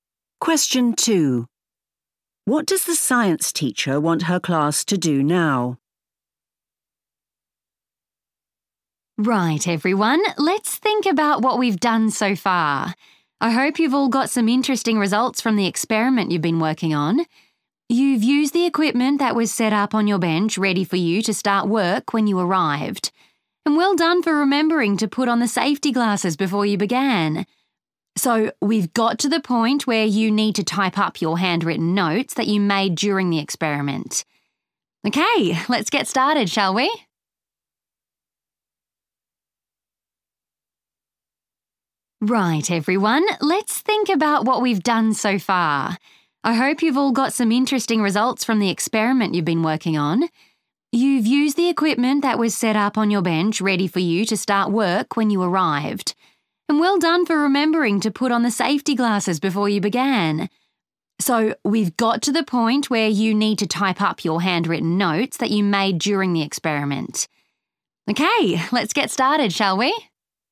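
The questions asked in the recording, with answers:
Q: What does the science teacher want her class to do now?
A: type up their handwritten notes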